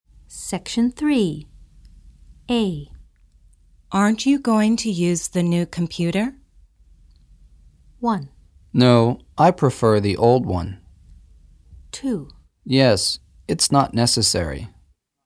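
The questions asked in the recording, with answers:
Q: Aren't you going to use the new computer?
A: 1: No, I prefer the old one.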